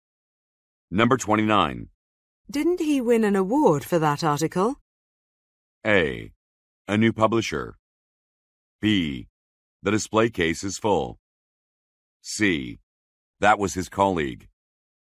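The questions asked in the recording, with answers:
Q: Didn't he win an award for that article?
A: C: That was his colleague.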